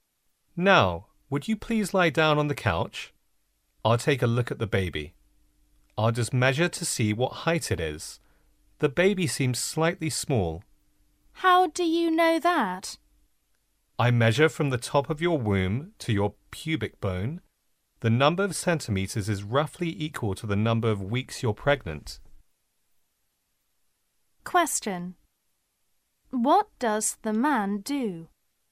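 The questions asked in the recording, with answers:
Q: What does the man do?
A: He measures the height of the baby in the womb.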